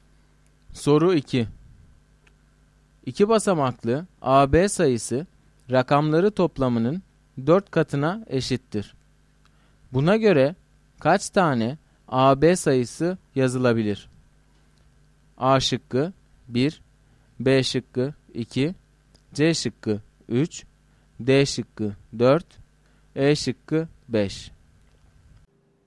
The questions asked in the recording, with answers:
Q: Buna göre kaç tane AB sayısı yazılabilir?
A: Doğru cevap D şıkkı.